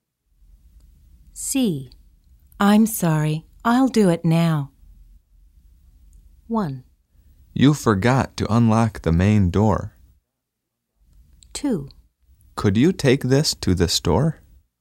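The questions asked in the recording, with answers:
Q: I'm sorry, I'll do it now.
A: 1: You forgot to unlock the main door.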